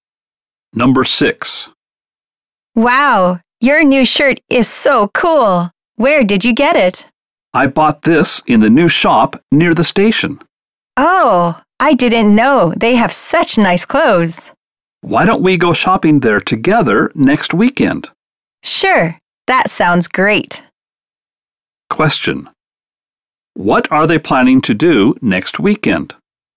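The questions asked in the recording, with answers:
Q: What are they planning to do next weekend?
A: Go shopping together at the new shop near the station.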